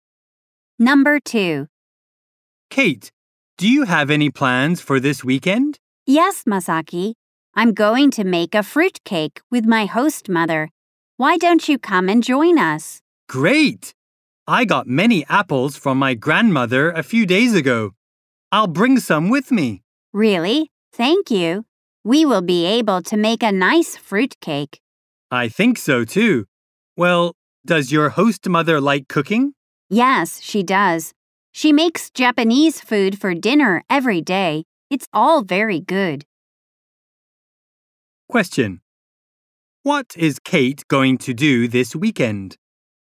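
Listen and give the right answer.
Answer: Make a fruit cake with her host mother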